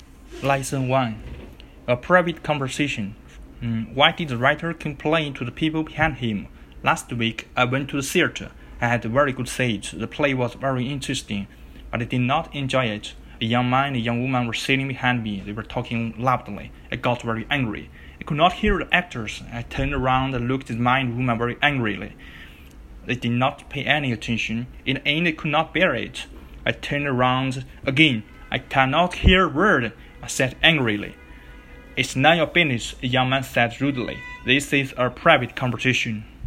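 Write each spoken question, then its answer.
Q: why did the writer complain to the people behind him?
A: Because they were talking loudly and he could not hear the actors.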